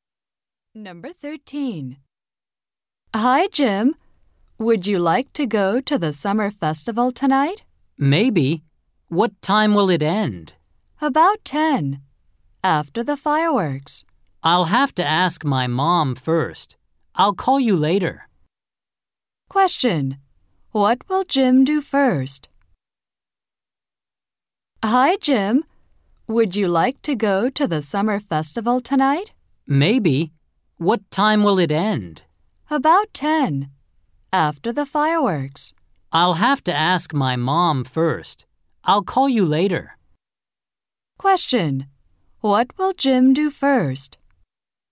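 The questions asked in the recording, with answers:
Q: What will Jim do first?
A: Ask his mom.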